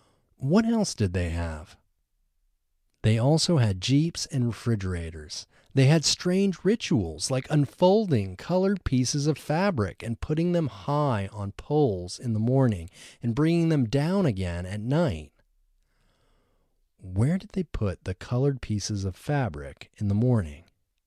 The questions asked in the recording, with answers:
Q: Where did they put the colored pieces of fabric in the morning?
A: They put the colored pieces of fabric high on poles in the morning.